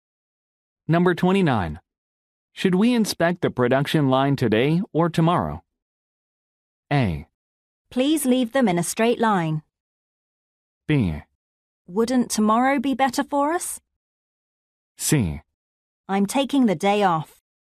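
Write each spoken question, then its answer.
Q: Should we inspect the production line today or tomorrow?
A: B: Wouldn't tomorrow be better for us?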